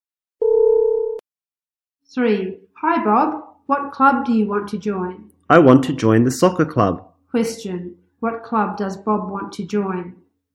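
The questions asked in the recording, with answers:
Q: What club does Bob want to join?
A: The soccer club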